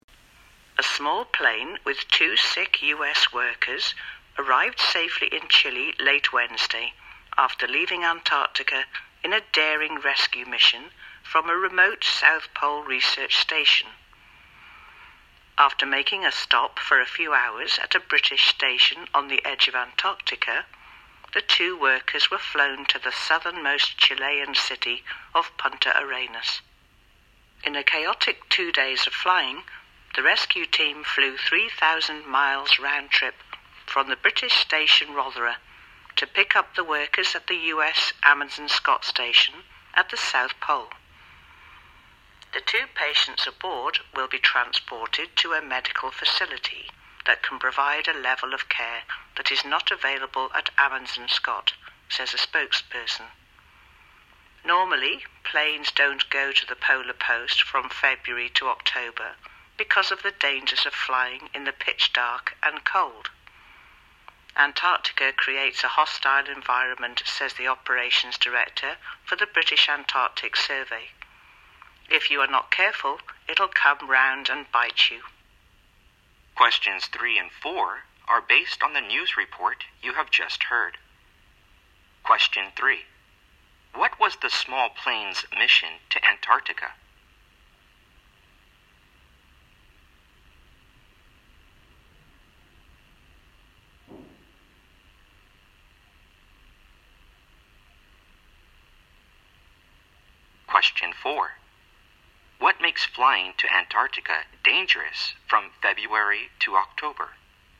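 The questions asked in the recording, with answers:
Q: What was the small plane's mission to Antarctica?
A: To rescue two sick U.S. workers from a South Pole research station

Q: What makes flying to Antarctica dangerous from February to October?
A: The pitch dark and cold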